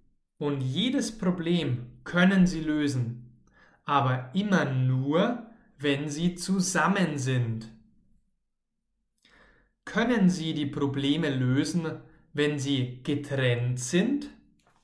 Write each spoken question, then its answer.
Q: Können Sie die Probleme lösen, wenn Sie getrennt sind?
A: Nein, nicht wenn Sie getrennt sind, sondern wenn Sie zusammen sind.